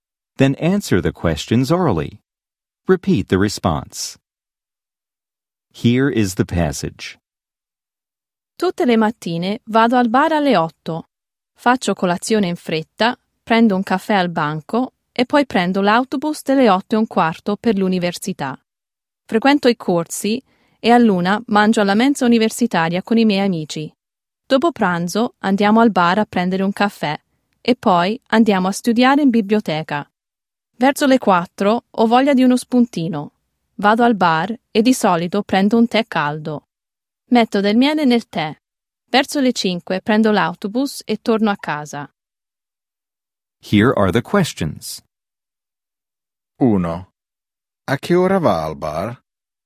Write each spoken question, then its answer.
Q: A che ora va al bar?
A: Alle 8.